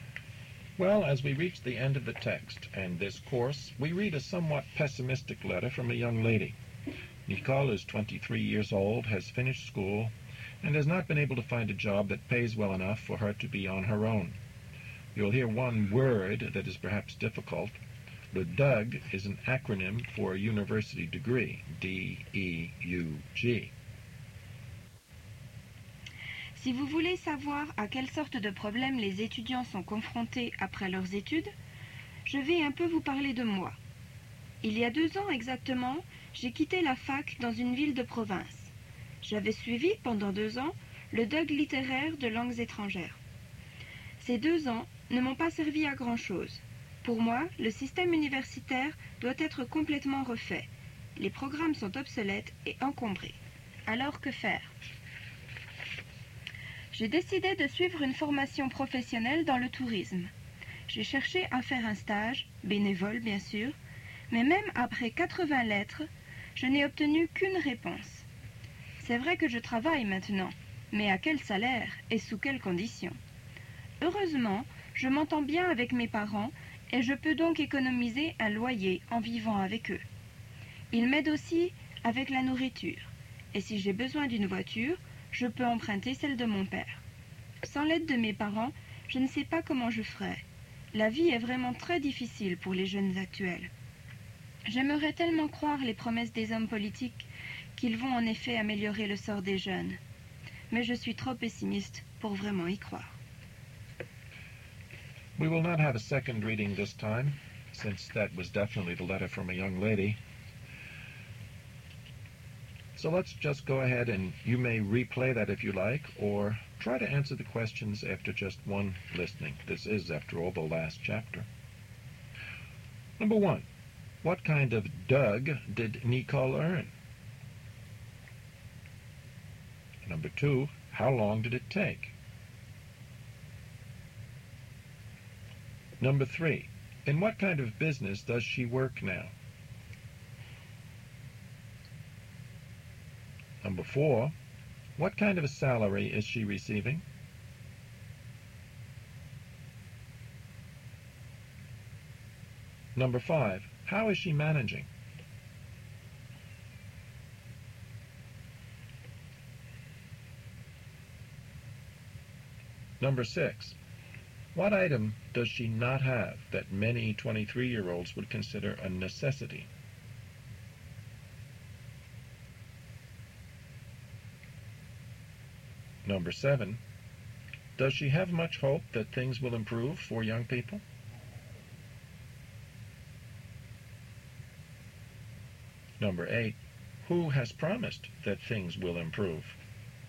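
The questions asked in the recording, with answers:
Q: What kind of DUG did Nicole earn?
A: A DEUG in literature, in foreign languages

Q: How long did it take?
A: Two years

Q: In what kind of business does she work now?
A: Tourism

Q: How is she managing?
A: She lives with her parents, who help her with rent, food and a car

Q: What item does she not have that many 23-year-olds would consider a necessity?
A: A car

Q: Does she have much hope that things will improve for young people?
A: No, she is too pessimistic

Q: Who has promised that things will improve?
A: Politicians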